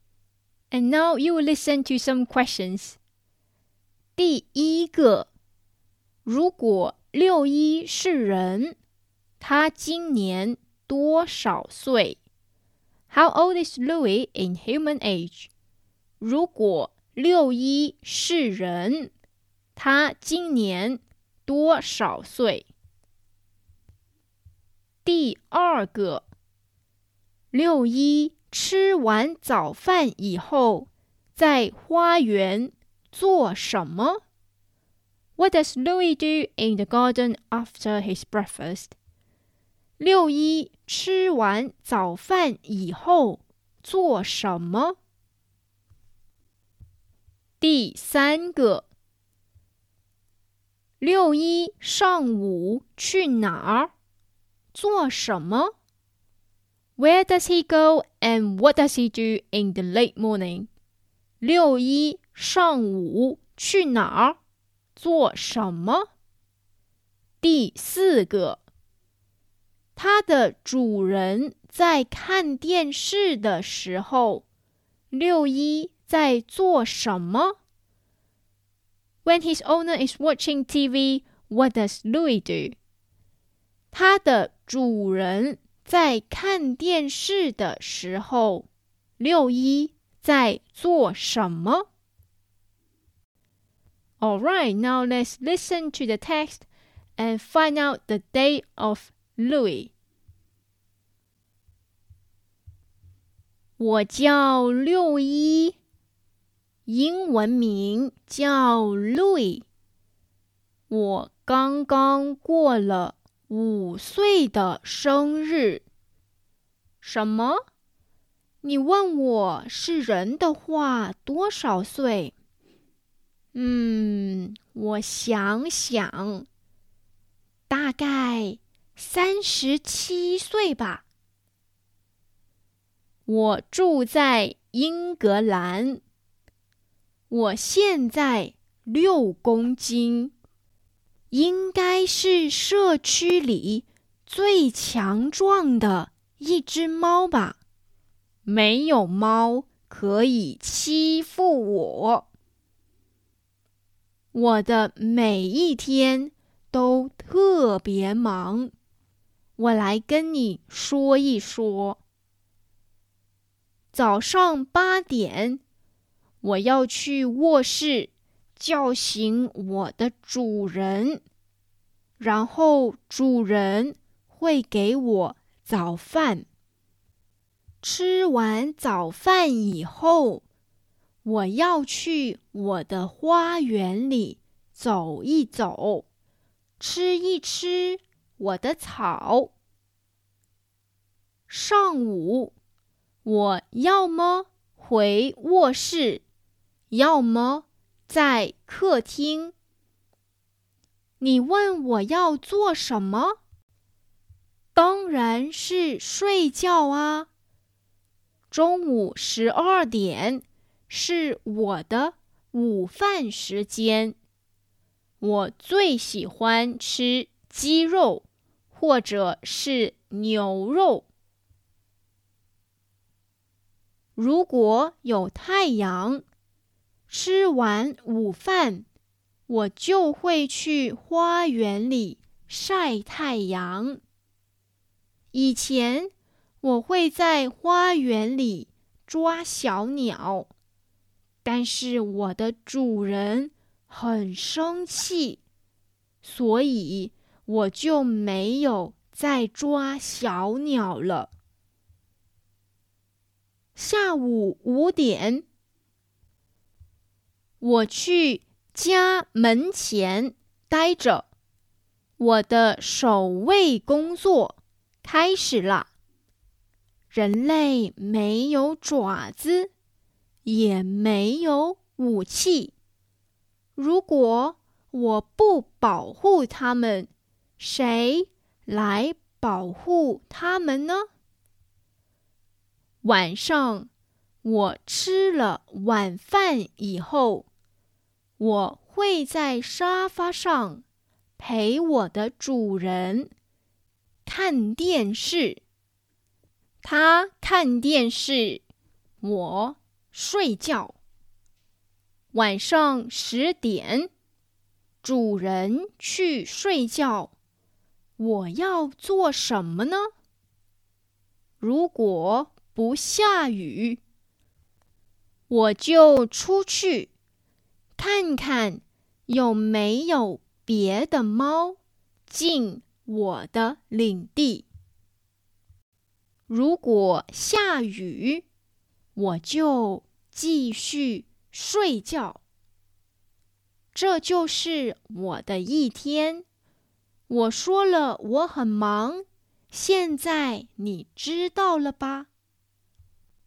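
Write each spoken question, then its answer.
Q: 如果六一是人他今年多少岁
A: 大概37岁

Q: 六一吃完早饭以后在花园做什么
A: 走一走,吃草

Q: 六一上午去哪儿做什么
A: 回卧室或者在客厅睡觉

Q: 他的主人在看电视的时候六一在做什么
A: 睡觉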